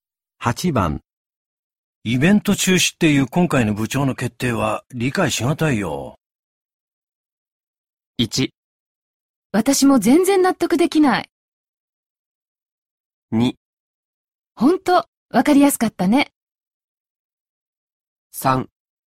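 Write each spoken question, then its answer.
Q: イベント中止っていう今回の部長の決定は理解しがたいよ。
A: 1: 私も全然納得できない。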